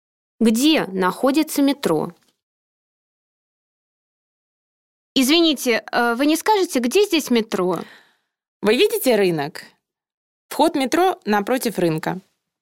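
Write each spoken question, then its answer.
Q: Где находится метро?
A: Напротив рынка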